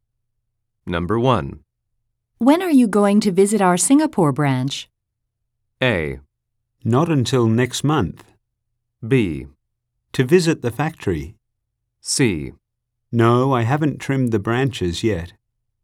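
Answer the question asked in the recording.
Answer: A: Not until next month.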